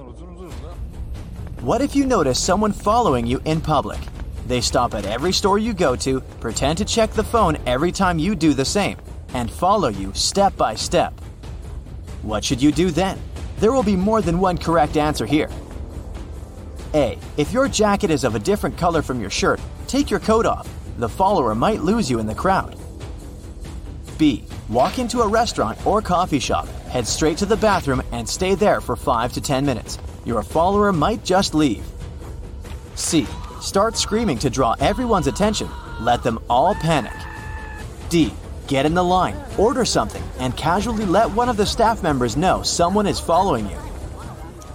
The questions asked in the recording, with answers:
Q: What should you do then?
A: Panic has never helped anyone, so C is the only wrong answer here.